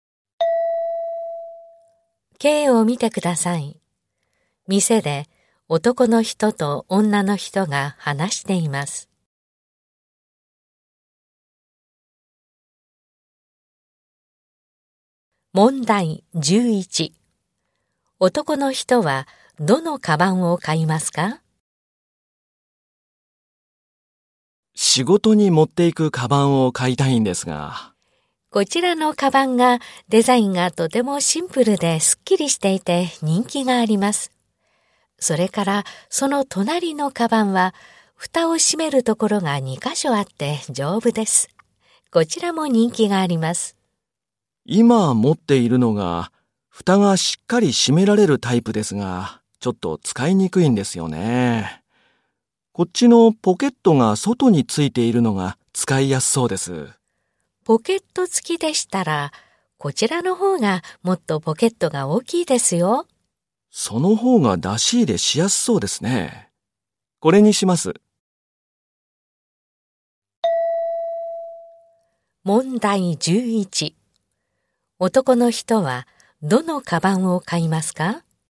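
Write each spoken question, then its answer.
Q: 男の人は、どのカバンを買いますか?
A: 外に大きいポケットがついているカバン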